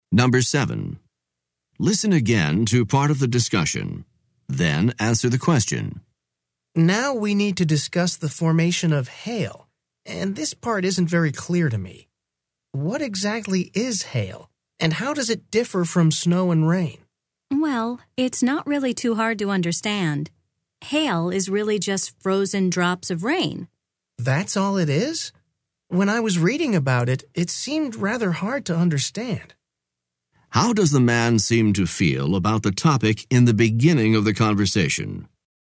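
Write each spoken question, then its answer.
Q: How does the man seem to feel about the topic in the beginning of the conversation?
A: He is confused; he finds hail hard to understand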